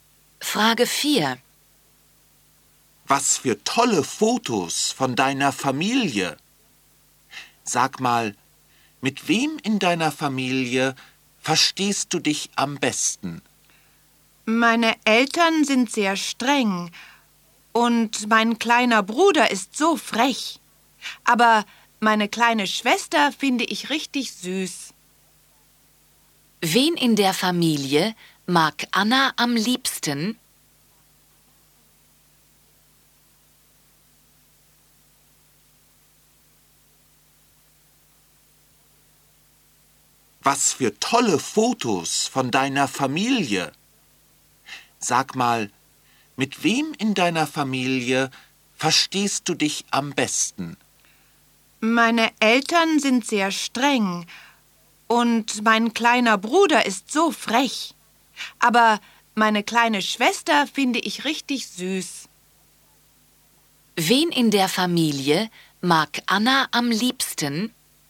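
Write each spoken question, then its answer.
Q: Wen in der Familie mag Anna am liebsten?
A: Ihre kleine Schwester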